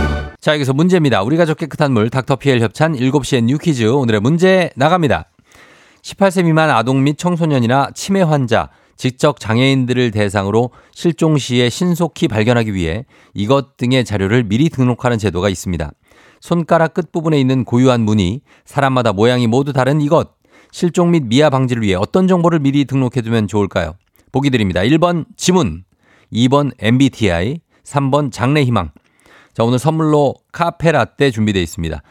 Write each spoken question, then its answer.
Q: 손가락 끝부분에 있는 고유한 무늬, 사람마다 모양이 모두 다른 이것, 실종 및 미아 방지를 위해 어떤 정보를 미리 등록해두면 좋을까요?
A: 정답은 1번 지문입니다.